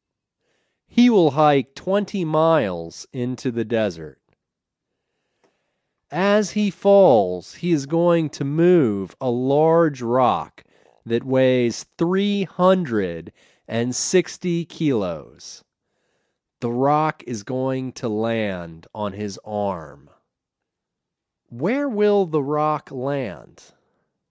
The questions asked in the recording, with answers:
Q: Where will the rock land?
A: The rock will land on his arm.